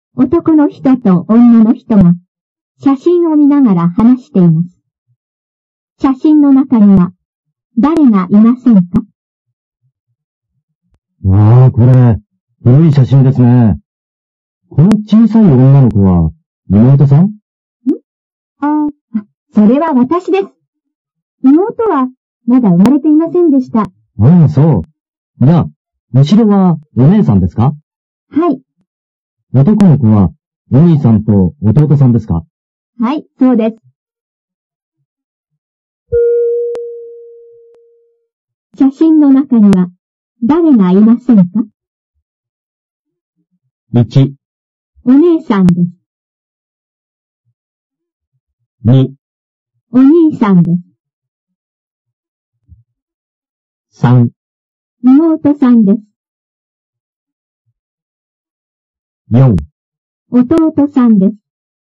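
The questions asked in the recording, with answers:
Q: 写真の中には誰がいませんか?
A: 3: 妹さんです。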